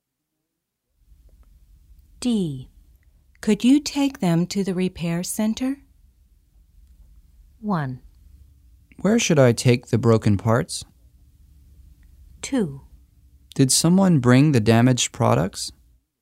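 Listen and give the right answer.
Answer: 1: Where should I take the broken parts?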